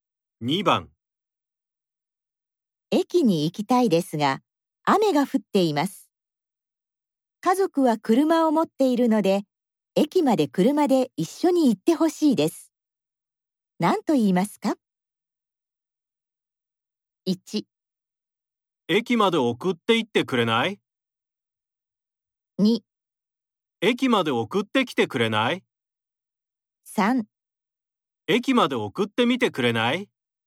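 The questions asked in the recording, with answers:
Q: 何と言いますか?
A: 1: 駅まで送って行ってくれない?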